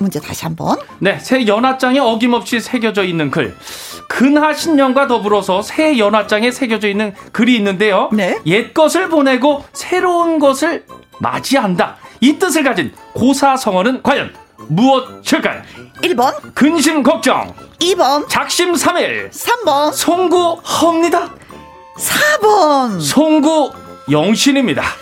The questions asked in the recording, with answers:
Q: 옛 것을 보내고 새로운 것을 맞이한다. 이 뜻을 가진 고사성어는 과연 무엇일까요?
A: 4번 송구영 신이 정답입니다.